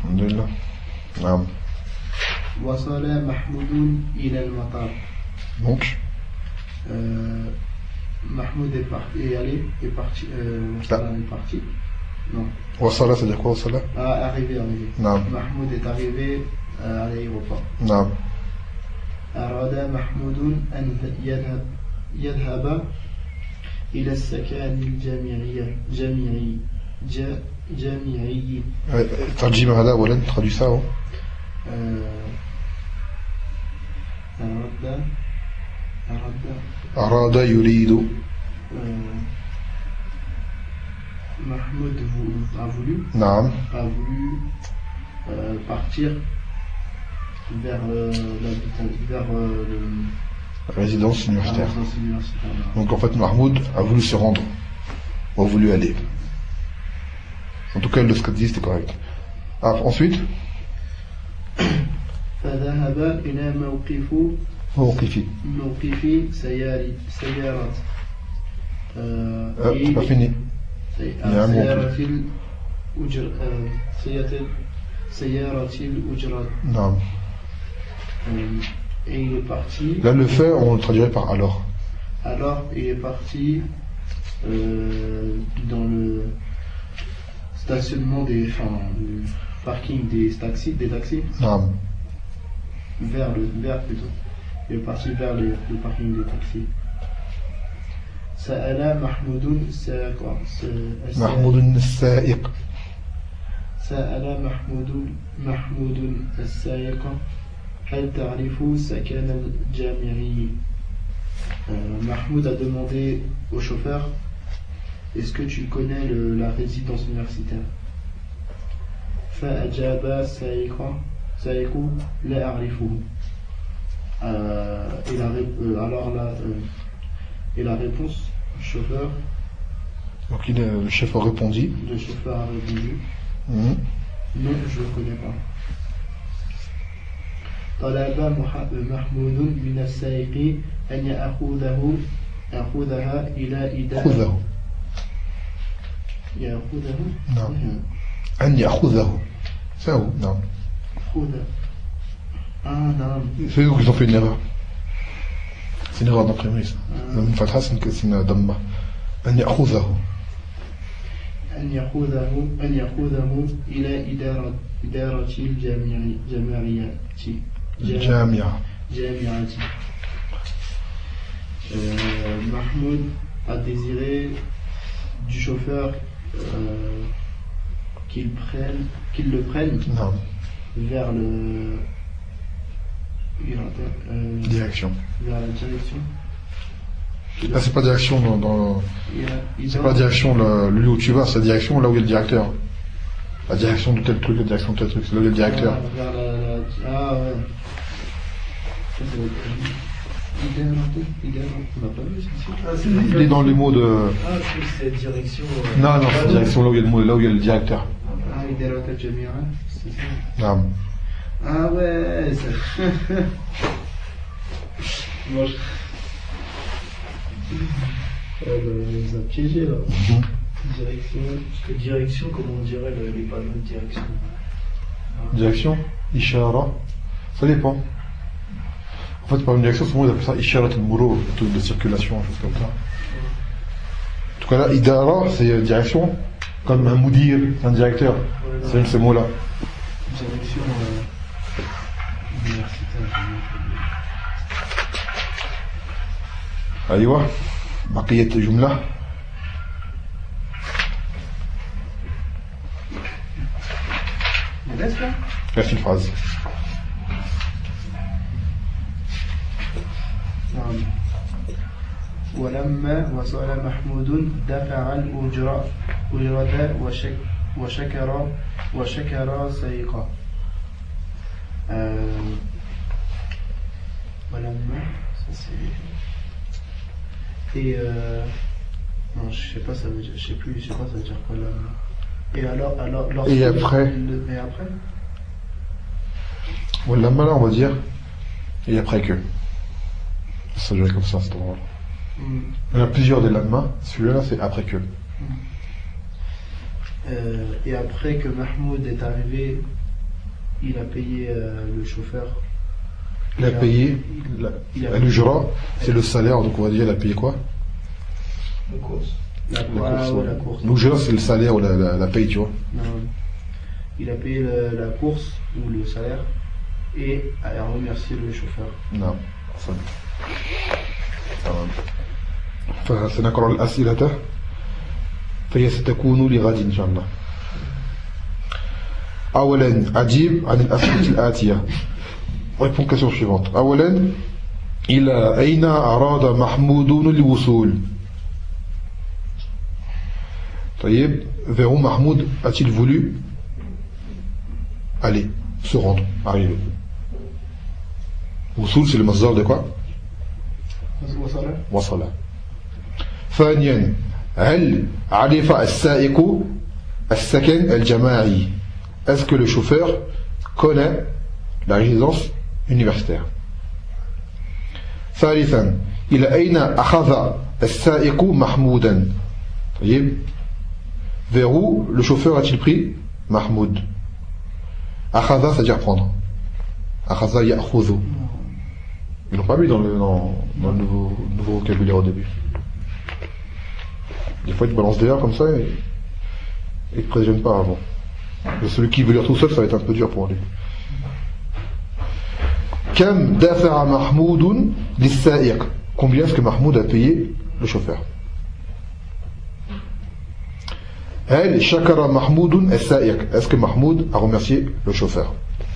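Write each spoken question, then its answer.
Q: إلى أين أراد محمود الوصول؟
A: إلى السكن الجامعي

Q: هل عرف السائق السكن الجماعي؟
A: لا، لم يعرفه

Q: إلى أين أخذ السائق محمودا؟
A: إلى إدارة الجامعة

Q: هل شكر محمود السائق؟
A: نعم، شكره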